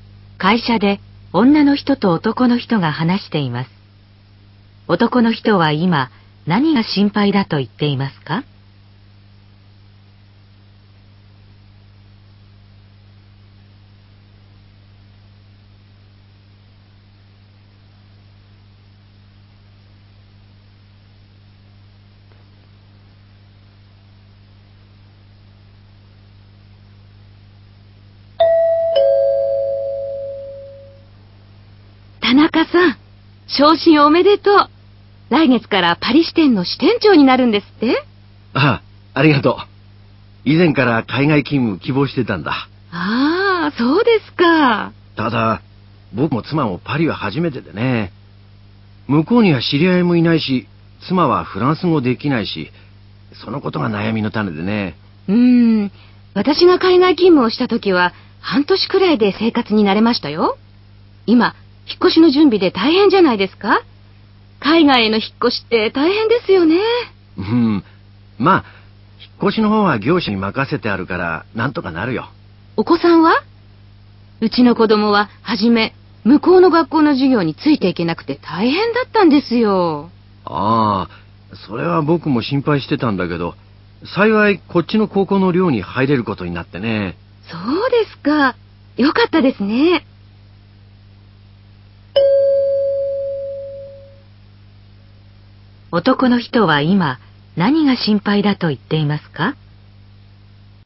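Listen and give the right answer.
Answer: パリに知り合いがいないことと、妻がフランス語ができないこと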